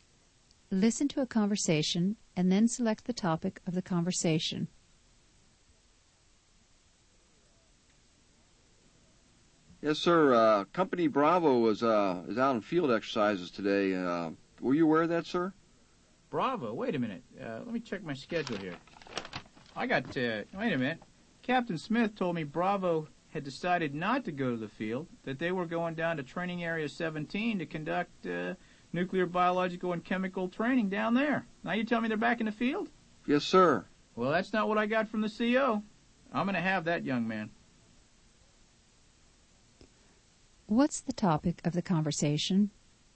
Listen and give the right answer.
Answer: They were discussing the location and activities of Company Bravo.